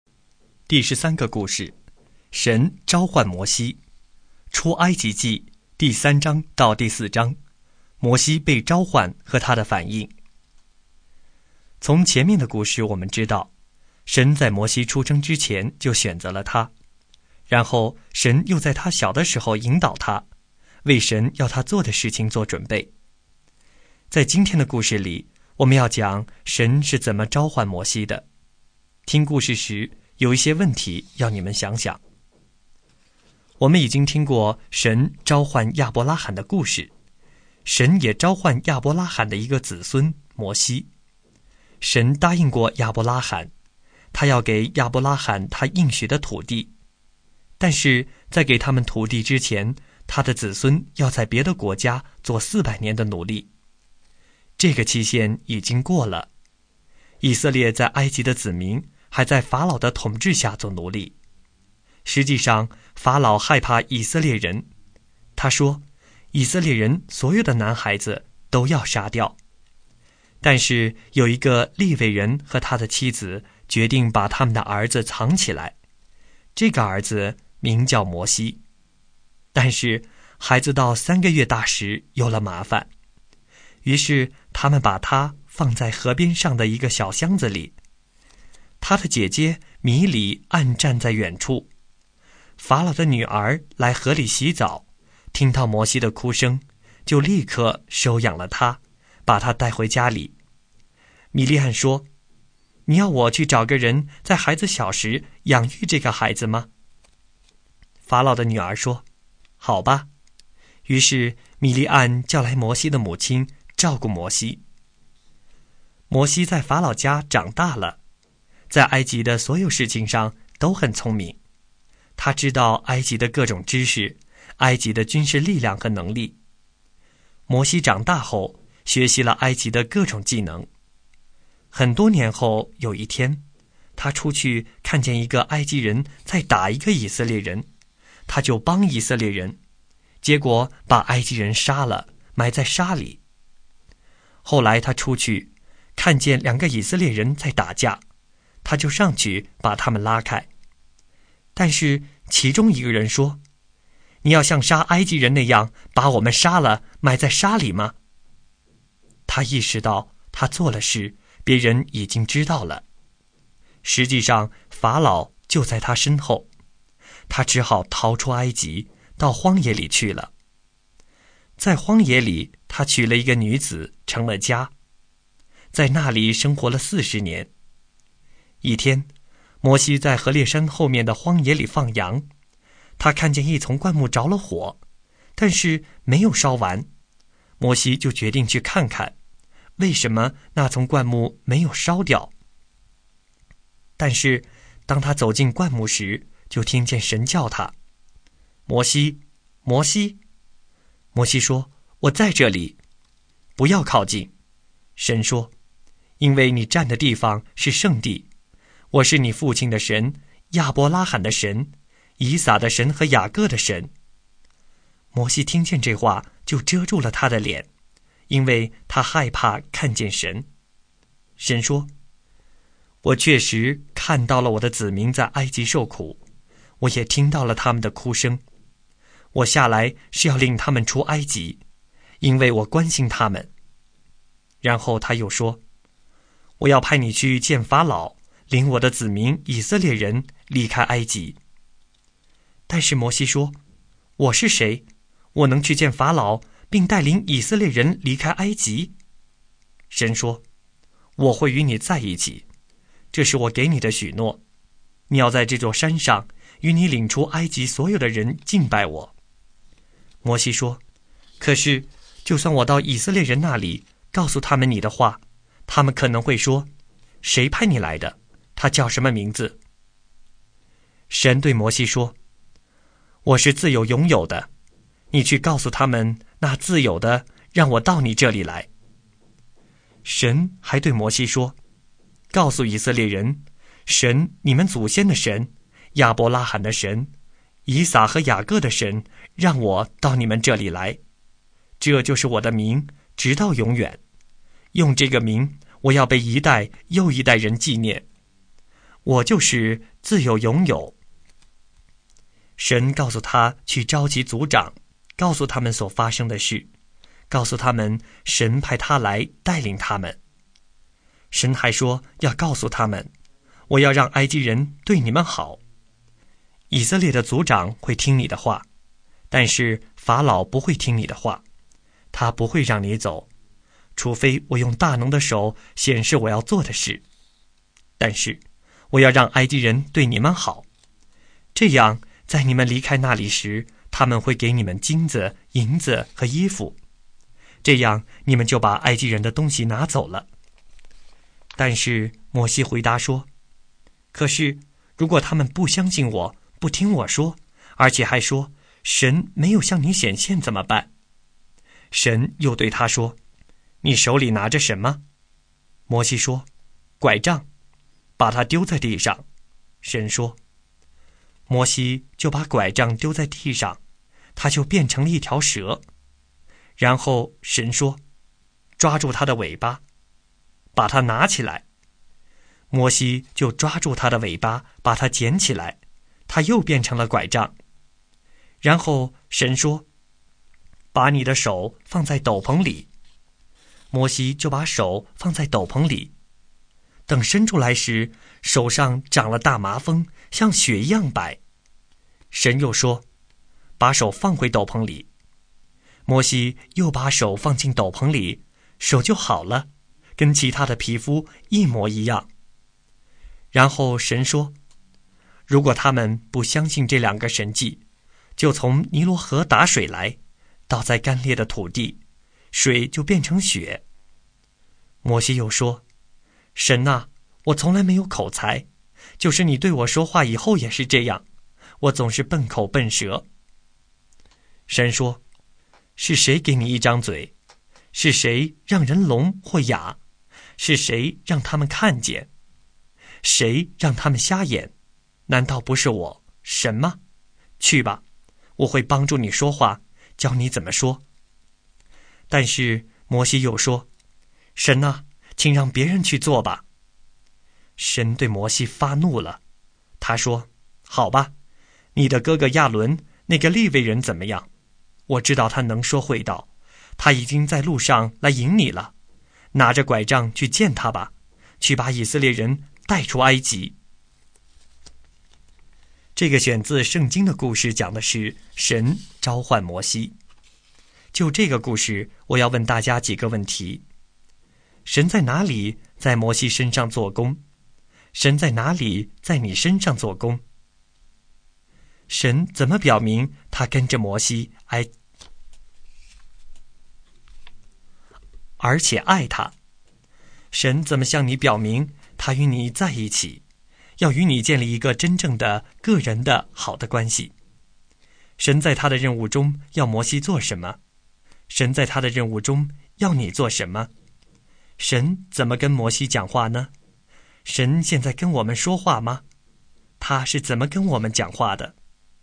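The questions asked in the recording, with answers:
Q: 神在他的任务中要摩西做什么?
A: 去见法老,带领以色列人离开埃及

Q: 神怎么跟摩西讲话呢?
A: 从着火却没有烧掉的灌木丛中呼叫他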